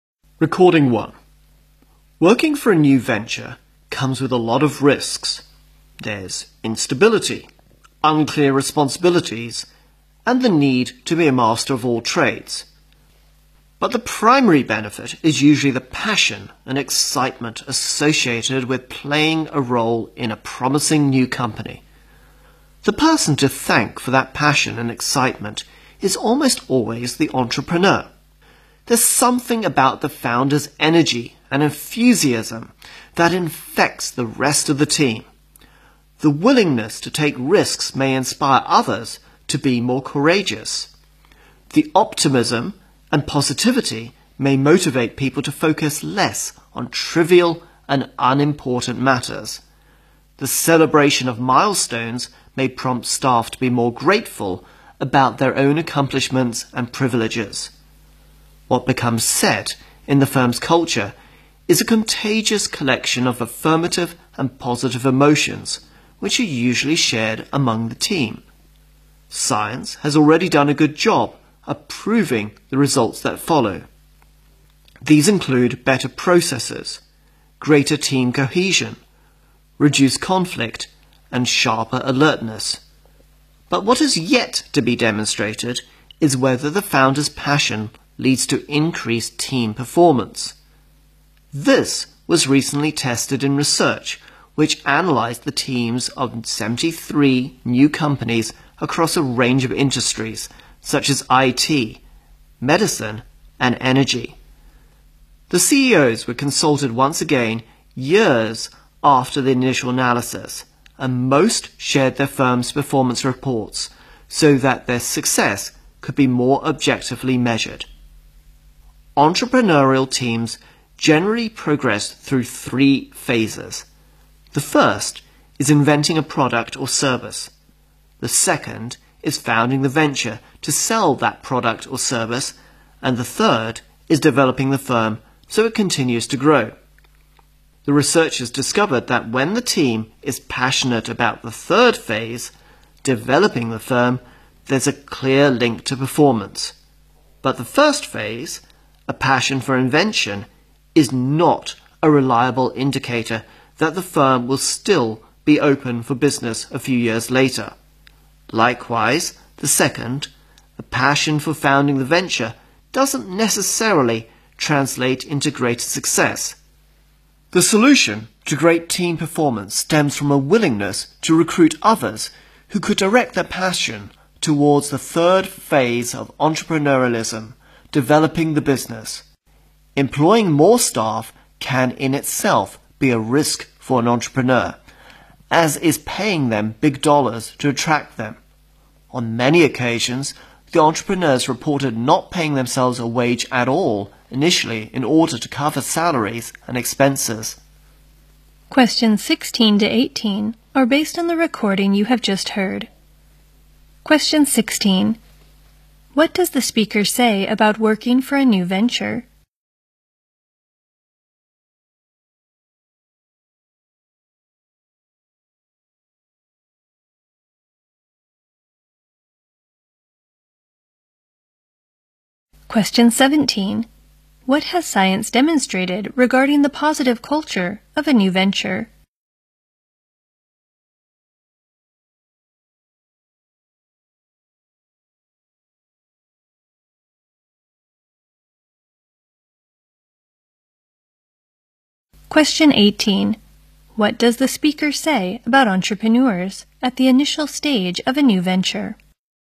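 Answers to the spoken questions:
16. It comes with many risks, but the main benefit is passion and excitement.
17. It leads to better processes, greater team cohesion, less conflict and sharper alertness.
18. They often paid themselves no wage, so they could cover salaries and expenses.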